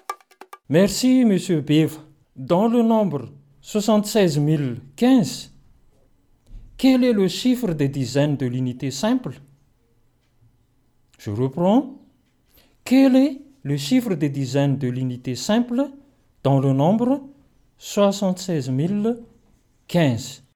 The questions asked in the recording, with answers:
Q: Dans le nombre 76015, quel est le chiffre des dizaines de l'unité simple?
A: 1 est le chiffre de dizaines de l'unité simple.